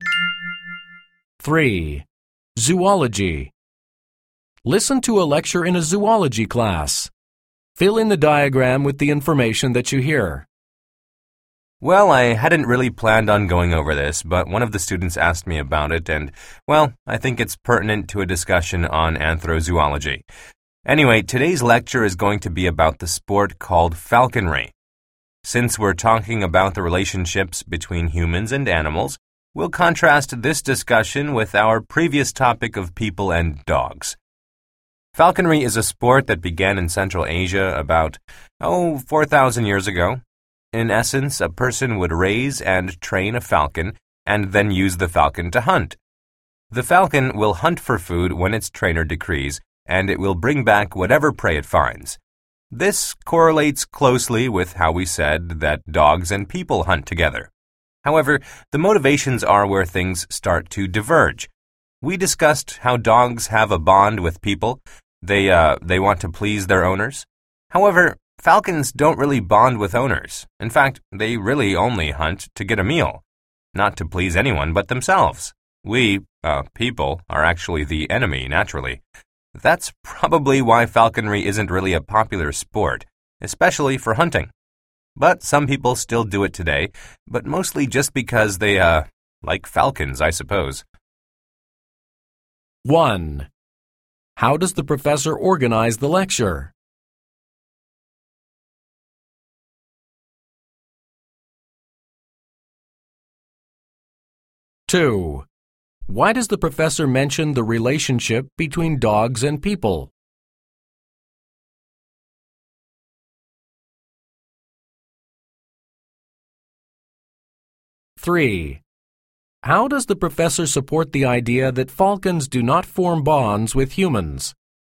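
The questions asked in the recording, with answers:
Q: Why does the professor mention the relationship between dogs and people?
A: To contrast it with the relationship between falcons and people

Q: How does the professor support the idea that falcons do not form bonds with humans?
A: By saying falcons hunt only to get a meal, not to please anyone, and that humans are naturally their enemy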